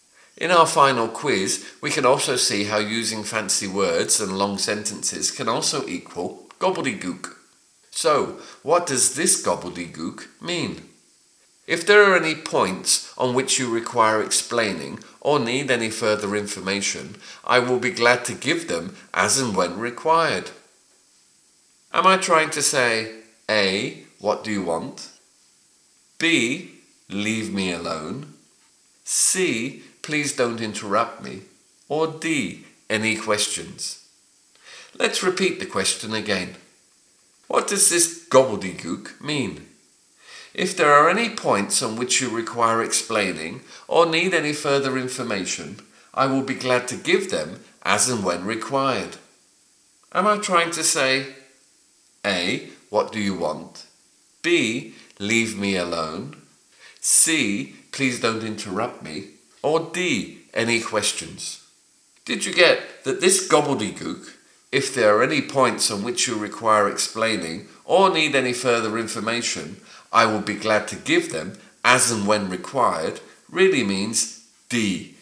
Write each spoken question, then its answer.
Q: So, what does this gobbledygook mean?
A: really means D. Any questions?